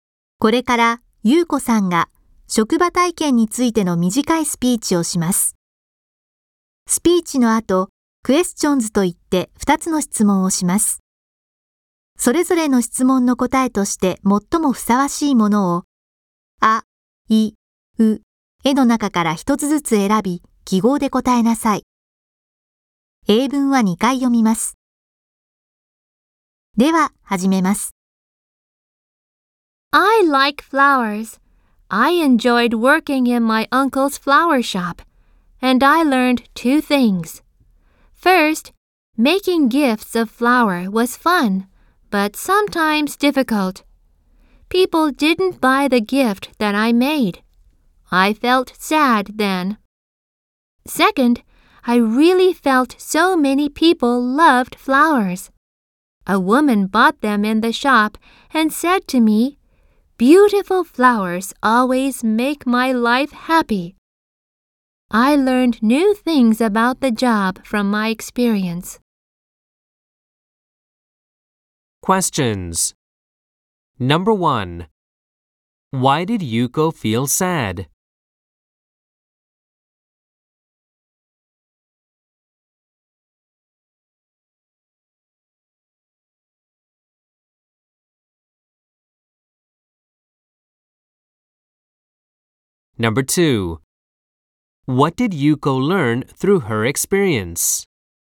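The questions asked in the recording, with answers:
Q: Why did Yuko feel sad?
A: Because people didn't buy the gift that she made.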